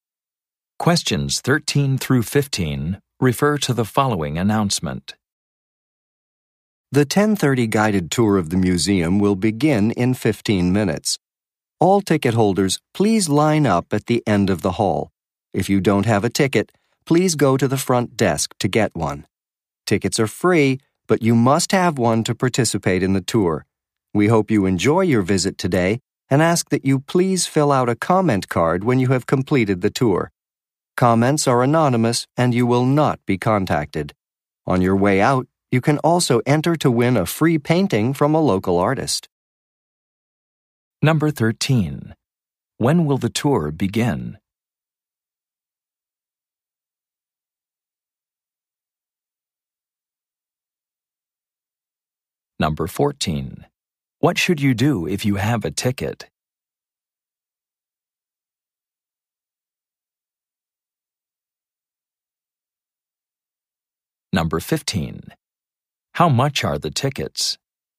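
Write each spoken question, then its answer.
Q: When will the tour begin?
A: In 15 minutes

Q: What should you do if you have a ticket?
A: Line up at the end of the hall

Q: How much are the tickets?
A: They are free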